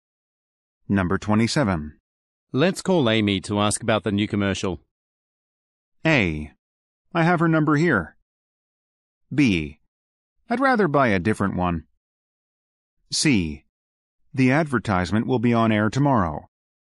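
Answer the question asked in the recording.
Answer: A: I have her number here.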